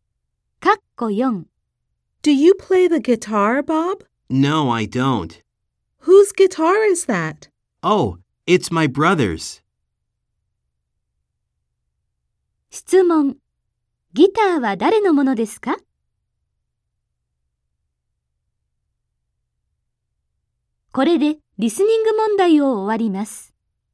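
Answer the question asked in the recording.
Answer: ボブのお兄さん(弟)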